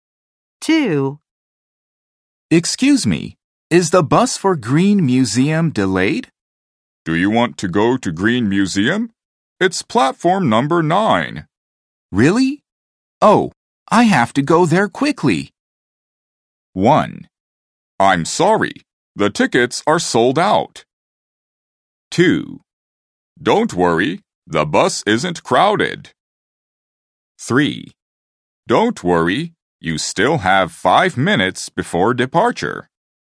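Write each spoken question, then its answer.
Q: Really? Oh, I have to go there quickly.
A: 3: Don't worry, you still have 5 minutes before departure.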